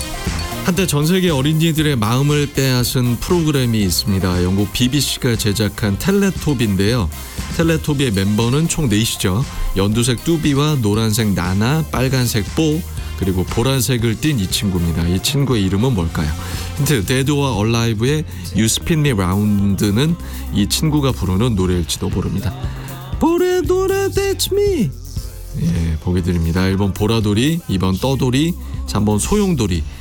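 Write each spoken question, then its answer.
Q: 이 친구의 이름은 뭘까요?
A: 1번: 보라돌이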